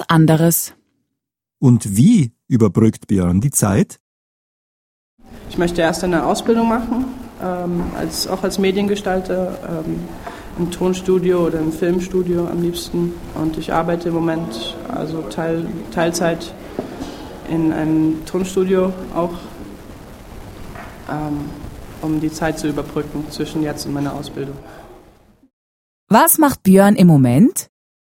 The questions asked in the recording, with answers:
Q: Was macht Björn im Moment?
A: Er arbeitet in einem Tonstudio.